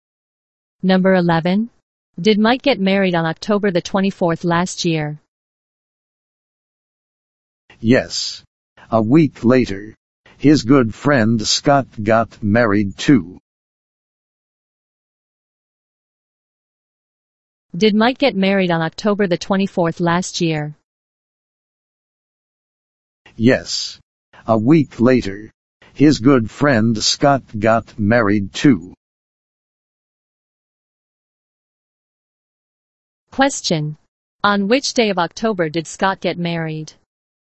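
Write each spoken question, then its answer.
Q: On which day of October did Scott get married?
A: October 31st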